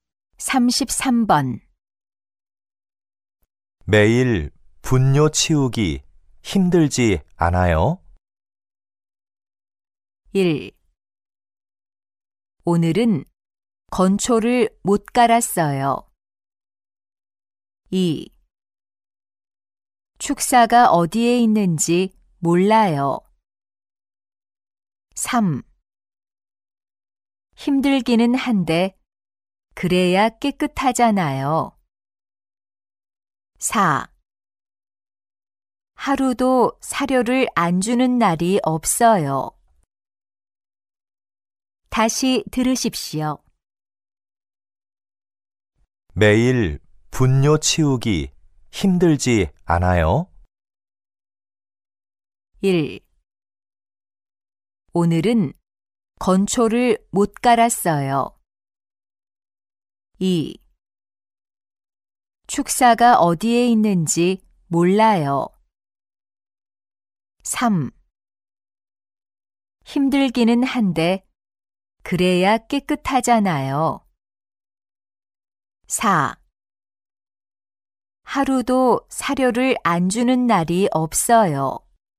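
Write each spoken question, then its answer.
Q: 매일 분뇨 치우기 힘들지 않아요?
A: 3: 힘들기는 한데 그래야 깨끗하잖아요.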